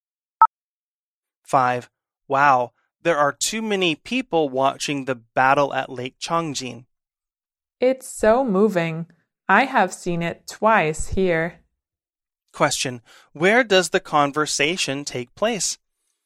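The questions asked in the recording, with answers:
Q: Where does the conversation take place?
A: In a cinema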